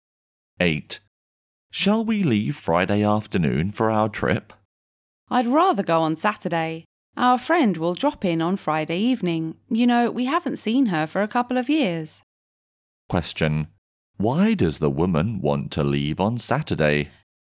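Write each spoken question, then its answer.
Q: Why does the woman want to leave on Saturday?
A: Because their friend will visit on Friday evening, and they haven't seen her for a couple of years.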